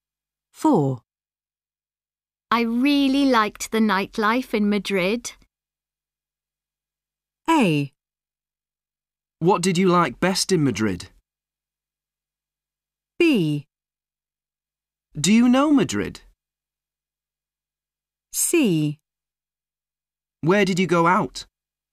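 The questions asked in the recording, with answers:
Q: I really liked the nightlife in Madrid.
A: C: Where did you go out?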